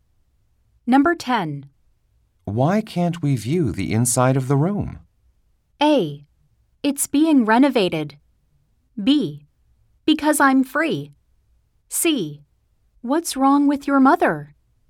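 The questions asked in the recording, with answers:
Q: Why can't we view the inside of the room?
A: A: It's being renovated.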